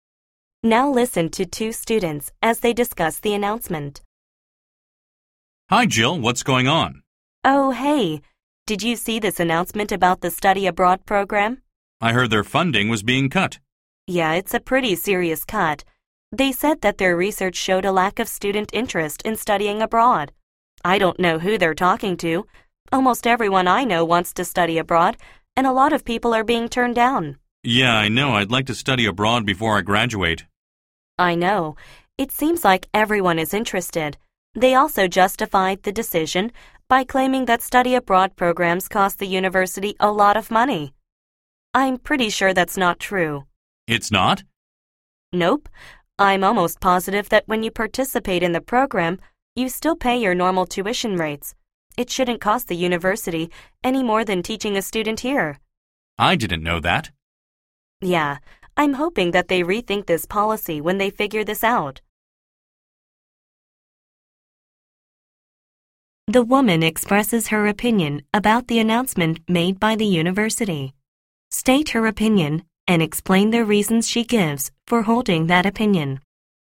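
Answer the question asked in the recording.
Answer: She disagrees with cutting the study abroad program's funding: many students want to study abroad (some are turned down), and it doesn't cost the university more because students still pay normal tuition.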